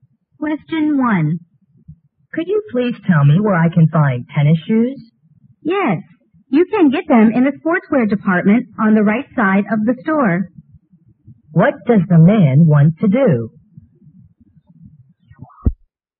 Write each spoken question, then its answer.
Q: What does the man want to do?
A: 好,那么他想买网球鞋对吧?